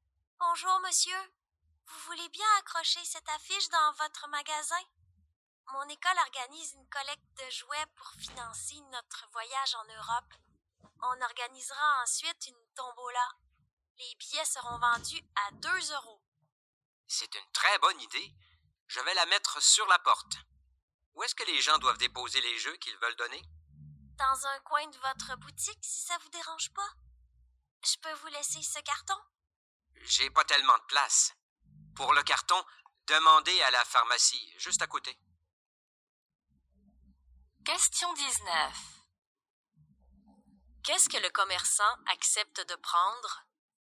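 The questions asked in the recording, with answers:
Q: Qu'est-ce que le commerçant accepte de prendre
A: l'affiche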